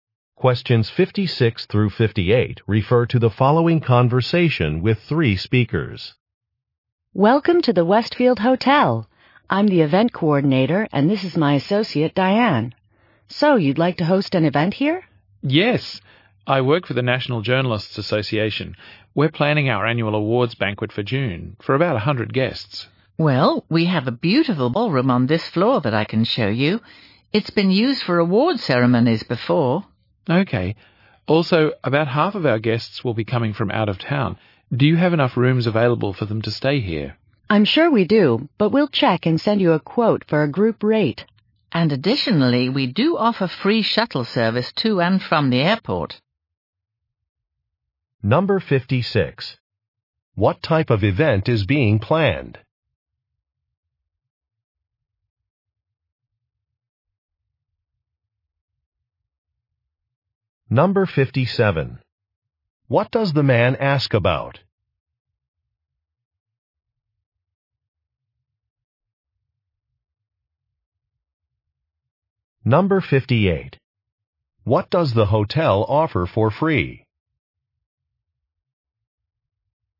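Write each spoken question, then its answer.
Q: What type of event is being planned?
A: An awards banquet

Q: What does the man ask about?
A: Room availability for guests

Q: What does the hotel offer for free?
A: Airport shuttle service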